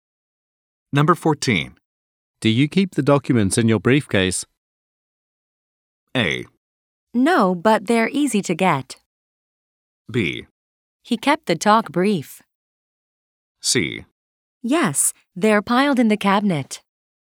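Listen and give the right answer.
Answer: A: No, but they're easy to get.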